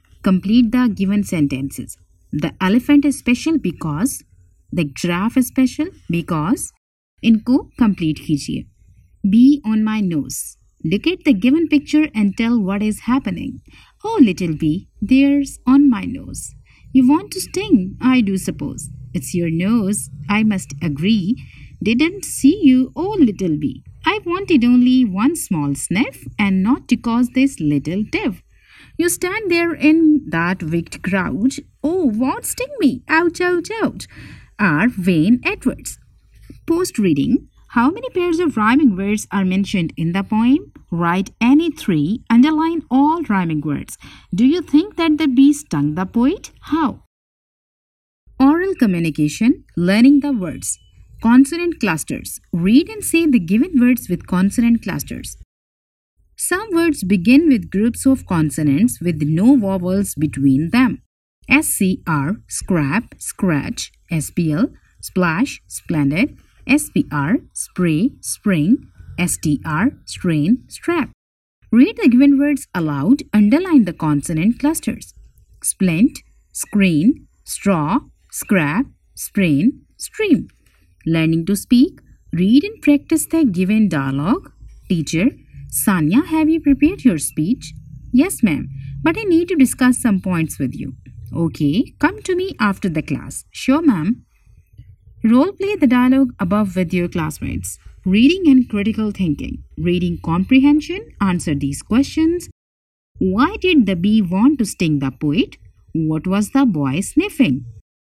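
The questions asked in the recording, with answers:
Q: Do you think that the bee stung the poet?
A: Yes, the poet cries "Ouch, ouch, ouch."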